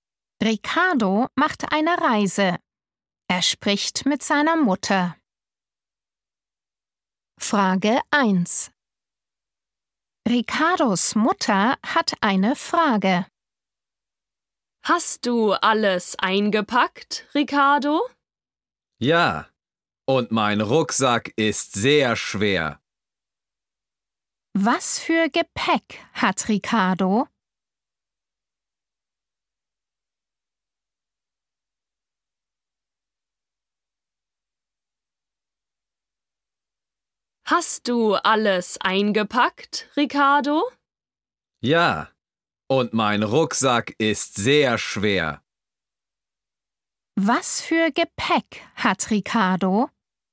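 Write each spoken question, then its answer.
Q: Was für Gepäck hat Ricardo?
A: einen Rucksack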